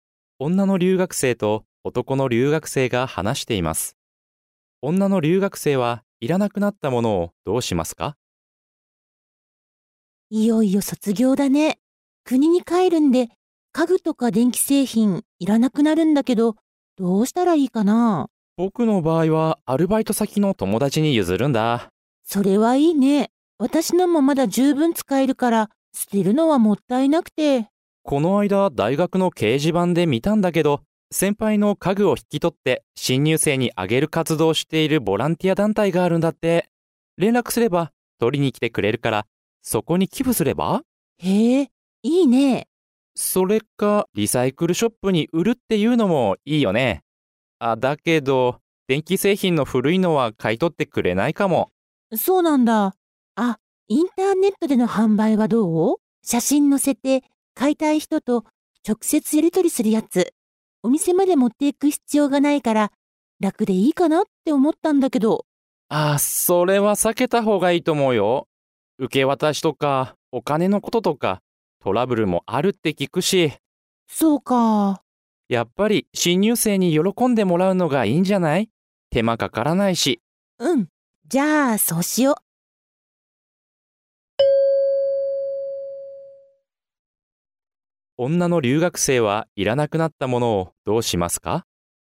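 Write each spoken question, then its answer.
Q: 女の留学生はいらなくなったものをどうしますか?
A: ボランティア団体に寄付する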